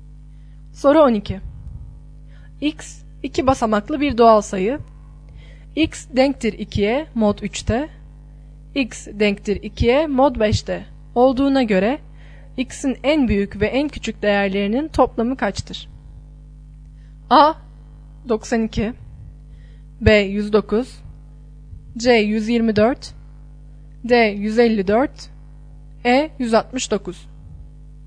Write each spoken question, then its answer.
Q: Olduğuna göre X'in en büyük ve en küçük değerlerinin toplamı kaçtır?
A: Doğru yanıt B şıkkı.